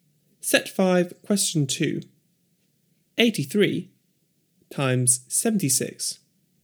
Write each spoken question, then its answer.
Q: 83 times 76.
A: 6,308.